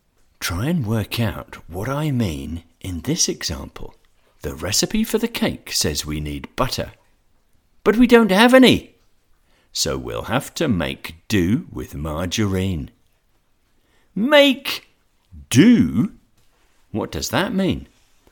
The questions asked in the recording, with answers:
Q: Make do? What does that mean?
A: To make do means to use what is available when you do not have the right thing or enough of the right thing.